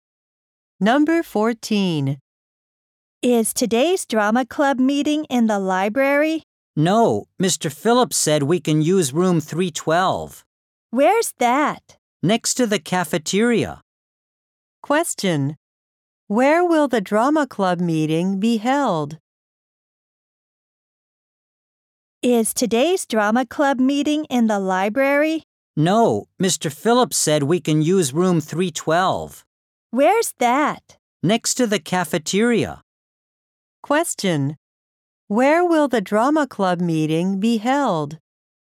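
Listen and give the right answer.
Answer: In room 312, next to the cafeteria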